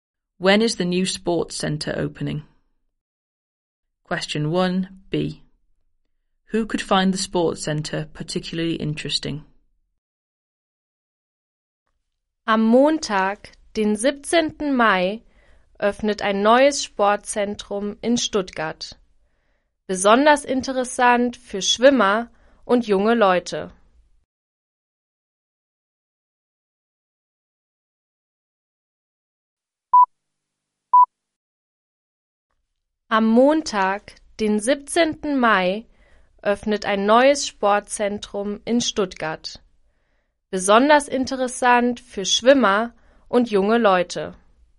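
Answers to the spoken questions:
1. Monday 17th May
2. Swimmers and young people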